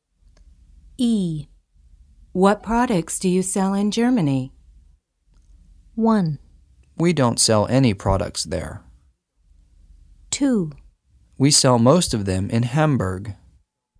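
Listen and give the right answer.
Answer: 1: We don't sell any products there.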